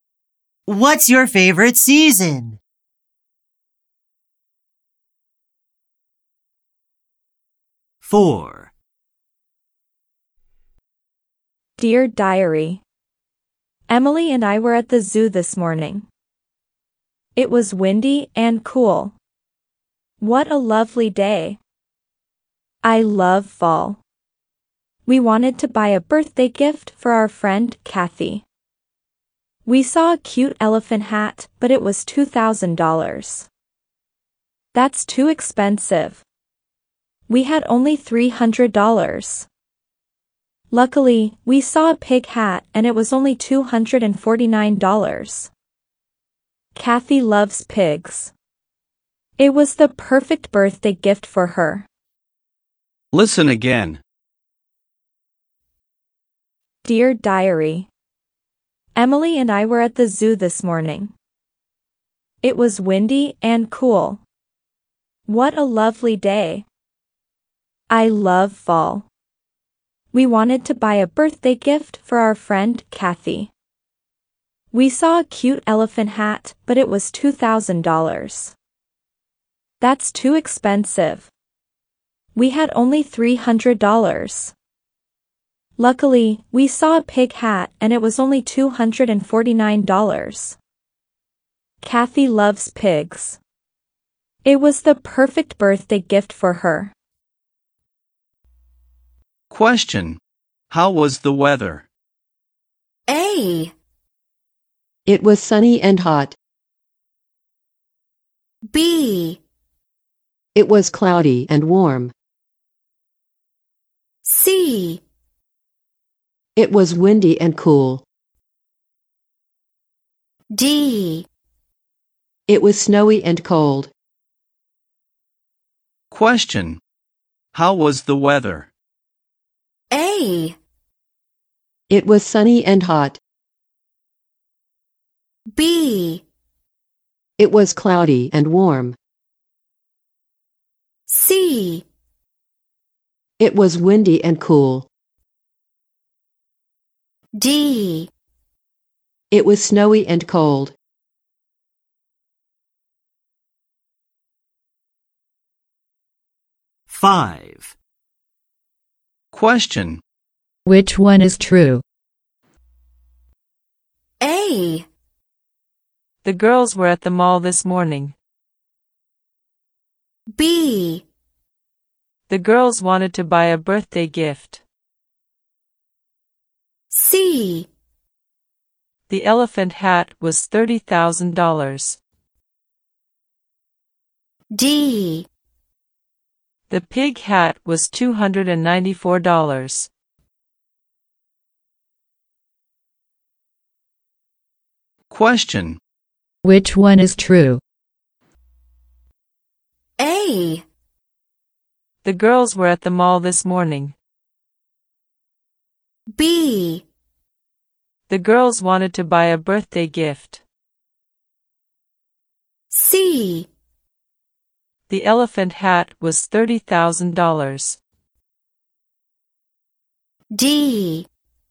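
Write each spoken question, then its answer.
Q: How was the weather?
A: C: It was windy and cool.

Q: Which one is true?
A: B: The girls wanted to buy a birthday gift.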